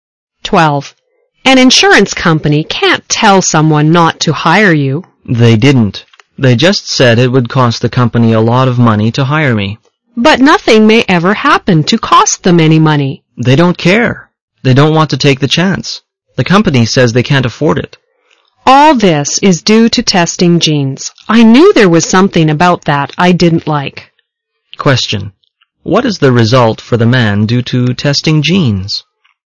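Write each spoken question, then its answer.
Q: What is the result for the man due to testing genes?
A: He may not get hired because the company says insuring him would cost too much.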